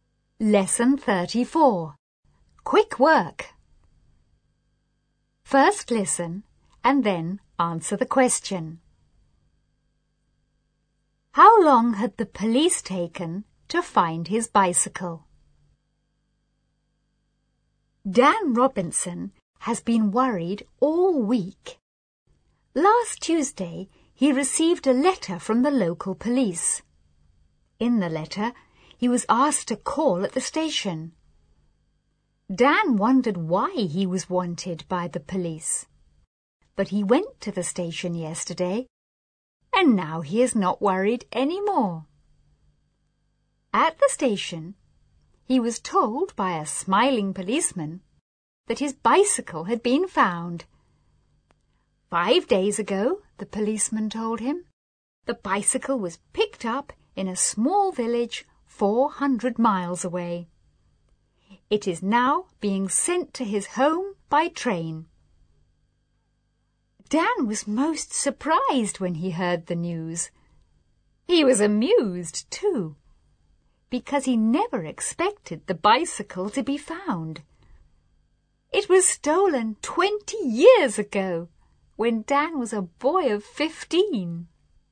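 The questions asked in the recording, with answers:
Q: How long had the police taken to find his bicycle?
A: About 20 years (it was stolen 20 years ago)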